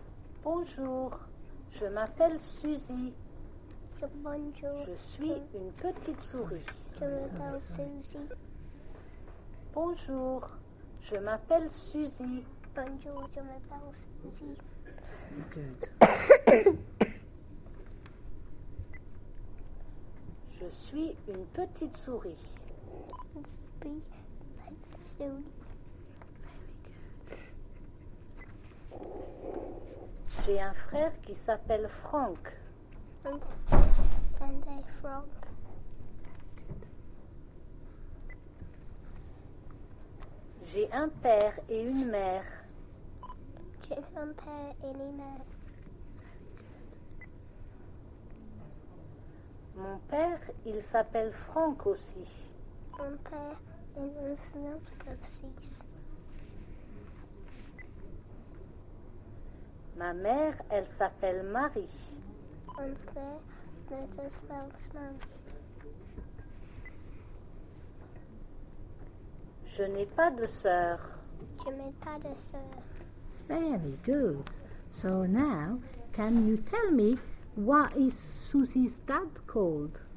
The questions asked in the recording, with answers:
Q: So now, can you tell me what is Susie's dad called?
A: Oh, he's called Frank.